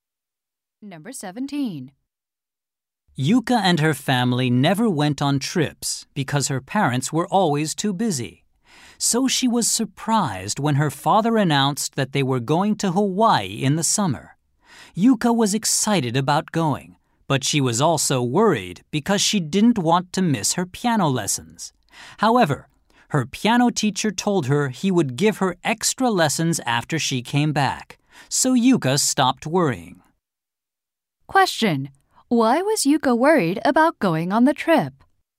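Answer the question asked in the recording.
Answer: She didn't want to miss her piano lessons.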